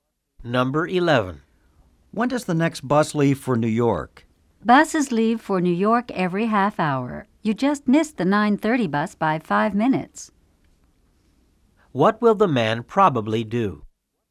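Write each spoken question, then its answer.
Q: What will the man probably do?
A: Take the 10:00 bus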